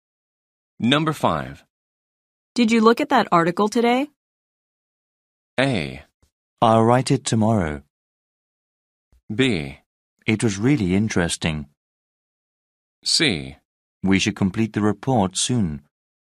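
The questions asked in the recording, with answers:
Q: Did you look at that article today?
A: B: It was really interesting.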